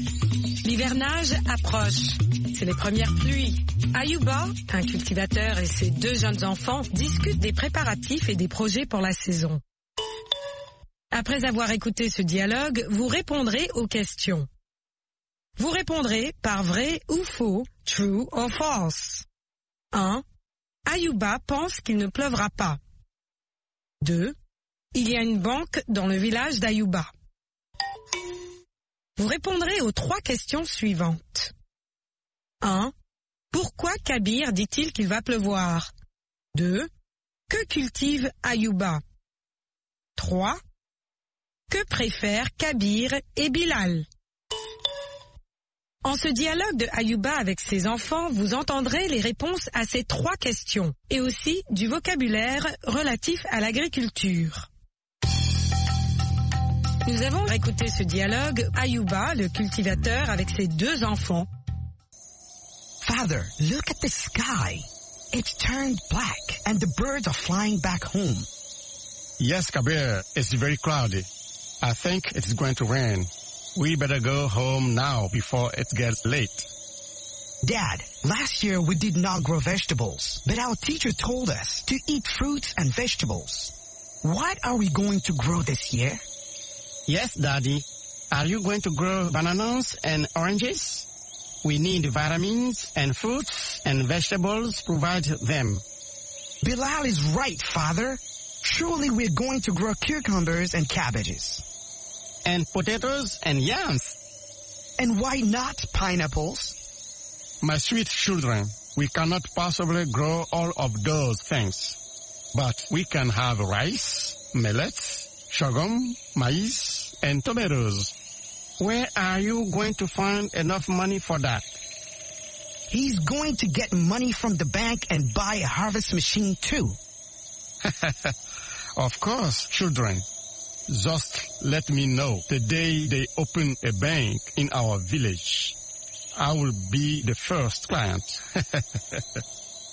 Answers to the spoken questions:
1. L'énoncé 1 est faux.
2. L'énoncé 2 est faux.
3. Parce que le ciel est nuageux.
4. Ayuba cultive du riz, du mil, du sorgho, du maïs et de la tomate.
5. Ils préfèrent les légumes et des fruits.